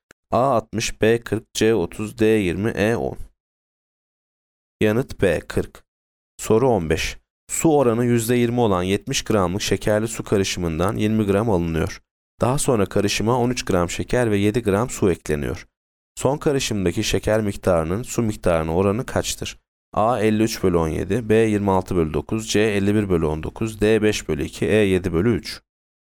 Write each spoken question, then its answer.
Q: Son karışımdaki şeker miktarının su miktarına oranı kaçtır?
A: Yanıt A 53 bölü 17.